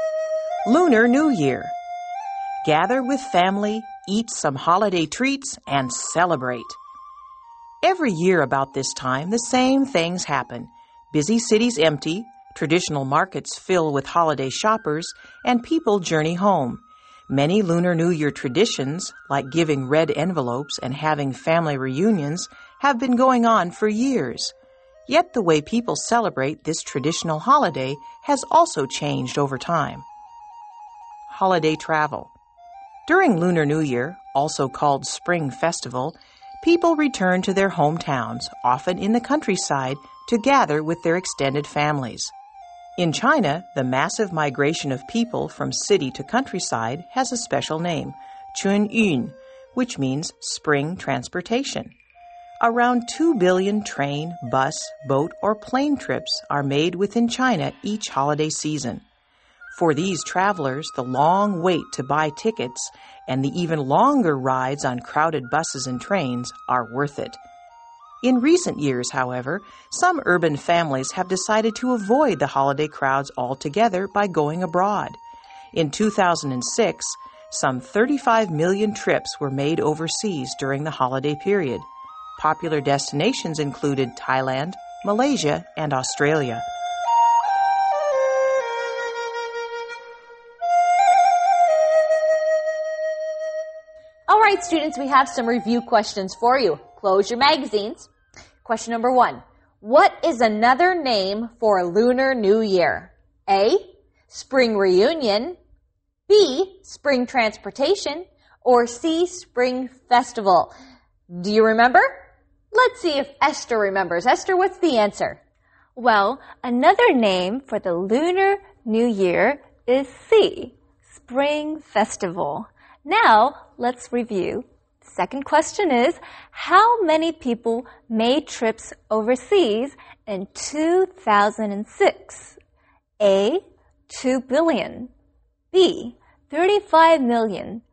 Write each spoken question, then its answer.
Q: What is another name for Lunar New Year?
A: Well, another name for the Lunar New Year is C.

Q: how many people made trips overseas in 2006?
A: So that answer is B.35 million people traveled abroad.